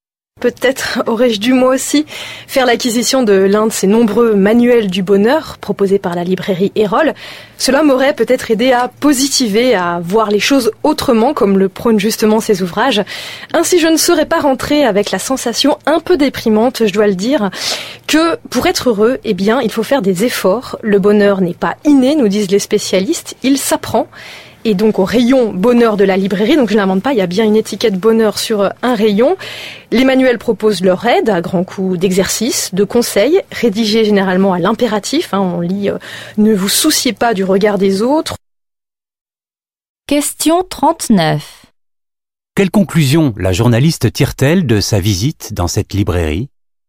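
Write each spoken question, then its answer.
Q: Quelle conclusion la journaliste tire-t-elle de sa visite dans cette librairie ?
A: Que pour être heureux, il faut faire des efforts : le bonheur n'est pas inné, il s'apprend.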